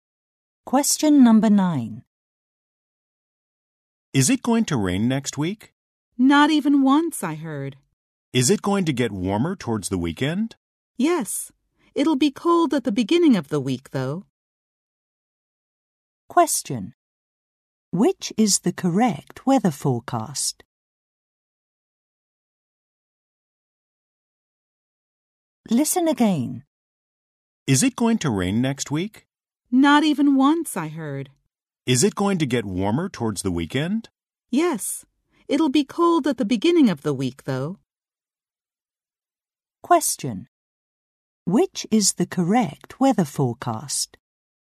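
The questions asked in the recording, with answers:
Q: Question. Which is the correct weather forecast?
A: No rain all week; cold at the start of the week, getting warmer toward the weekend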